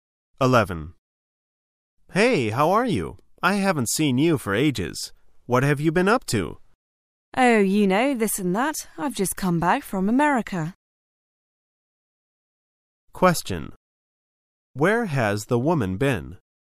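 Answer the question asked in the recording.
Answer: America

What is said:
[解析] M: Hey, how are you? I haven't seen you for ages. What have you been up to? W: Oh, you know, this and that. I've just come back from America. Q: Where has the woman been?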